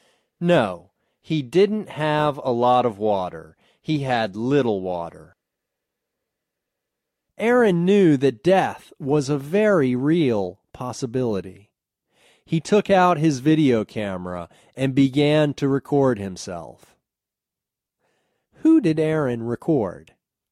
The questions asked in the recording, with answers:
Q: Who did Aaron record?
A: He recorded himself.